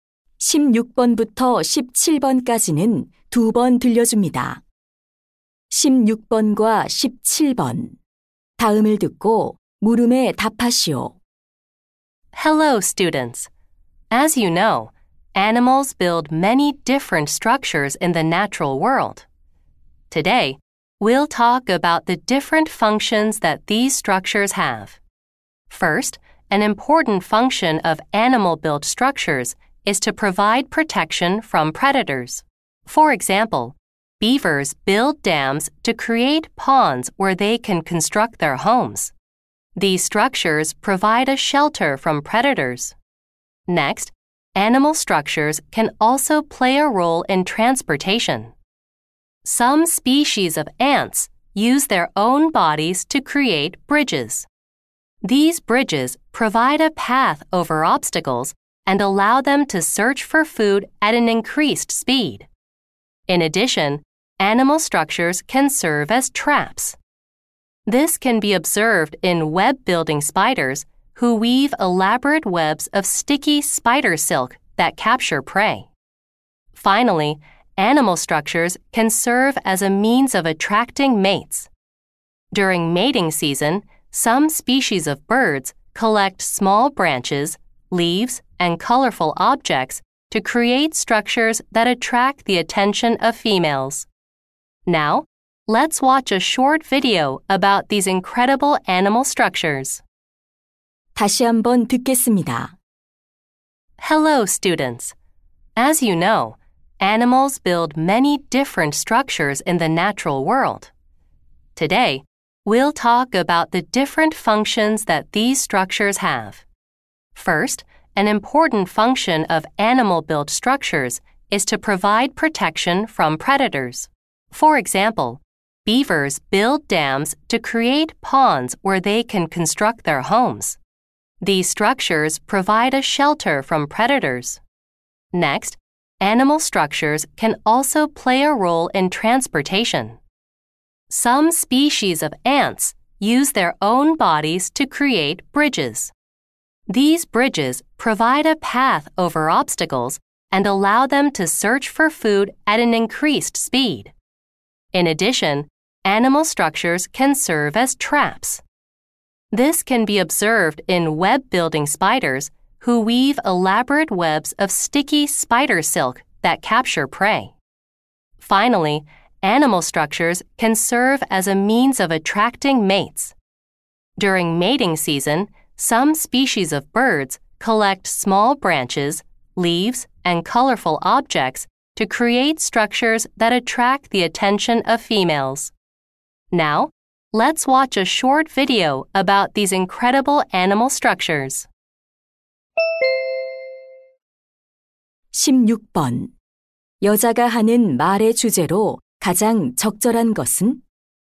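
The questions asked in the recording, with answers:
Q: 여자가 하는 말의 주제로 가장 적절한 것은?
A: 동물이 만든 구조물의 다양한 기능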